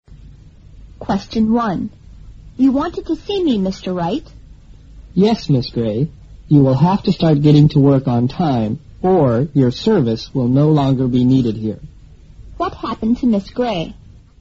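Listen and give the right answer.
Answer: She was warned that she would lose her job if she kept arriving late for work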